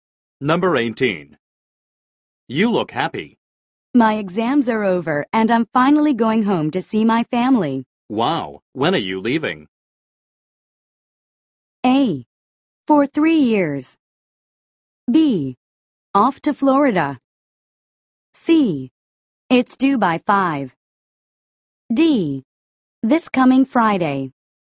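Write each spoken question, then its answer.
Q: Wow, when are you leaving?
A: D: This coming Friday.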